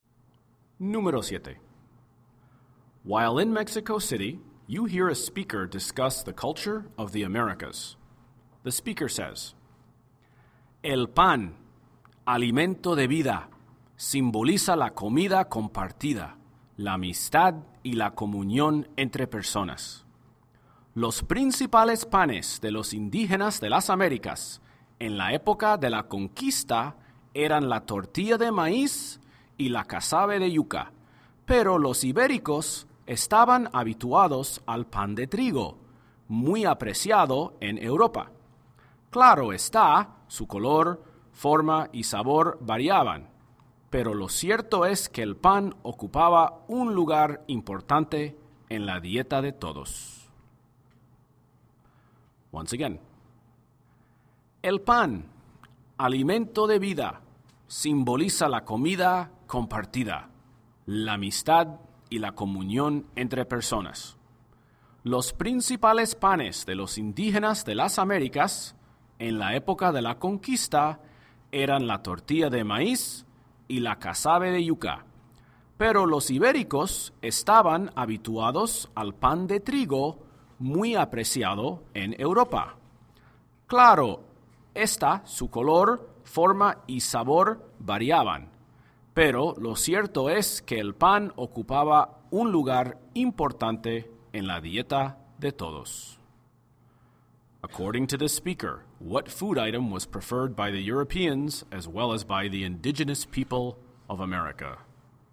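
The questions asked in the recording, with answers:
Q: According to the speaker, what food item was preferred by the Europeans as well as by the indigenous people of America?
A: Bread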